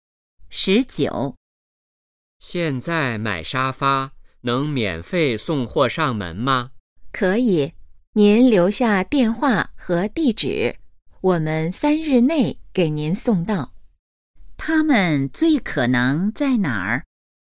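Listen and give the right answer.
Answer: 家具店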